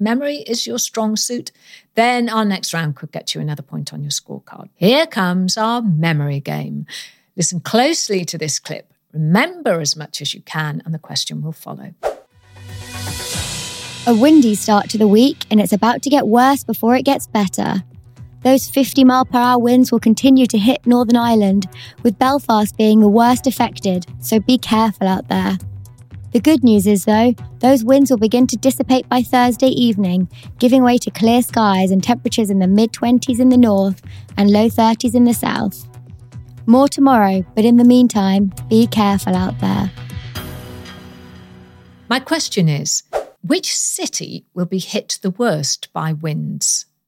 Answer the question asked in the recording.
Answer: And the answer was Belfast.